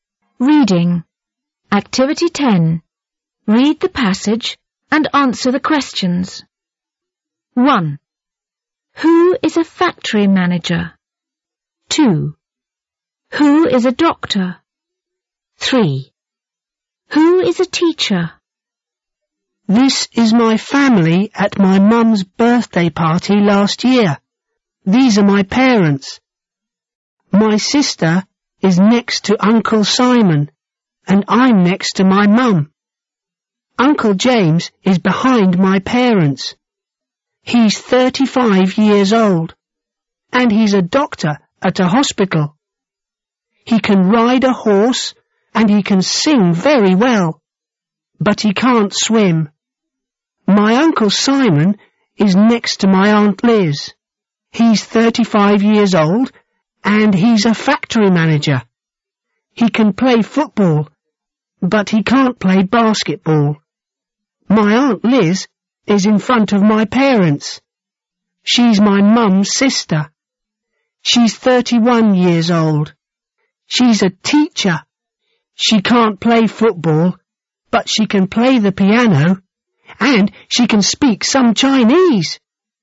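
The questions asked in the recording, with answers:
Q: Who is a factory manager?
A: Uncle Simon

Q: Who is a doctor?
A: Uncle James

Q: Who is a teacher?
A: Aunt Liz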